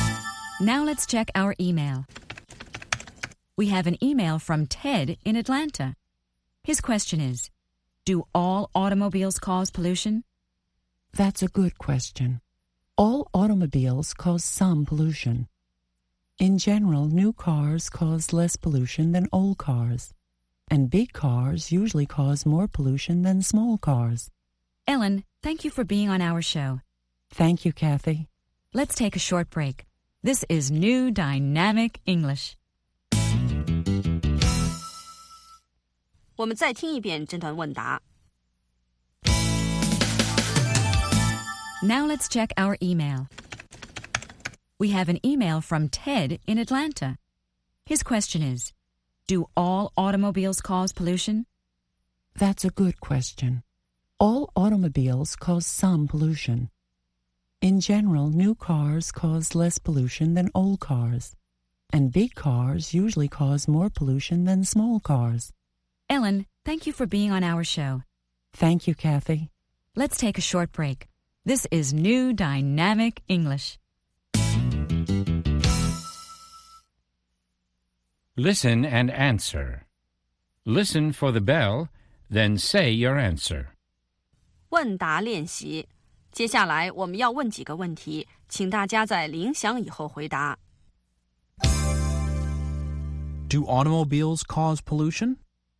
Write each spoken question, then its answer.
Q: Do automobiles cause pollution?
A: Yes, they do.Automobiles cause pollution.